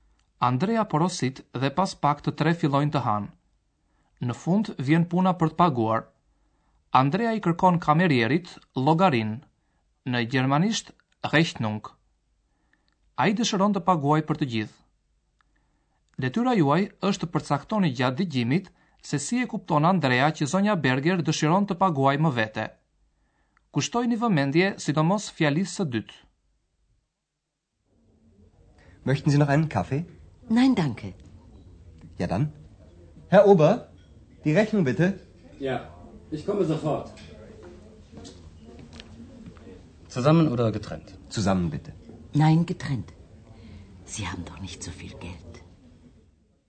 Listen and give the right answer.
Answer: Ajo thot: Jo, veç e veç. Nein, getrennt.